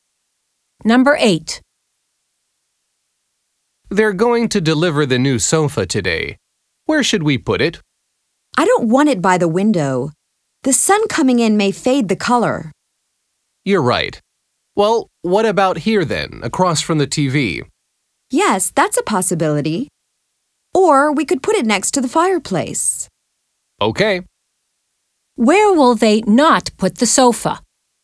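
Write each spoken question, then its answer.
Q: Where will they not put the sofa?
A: by the window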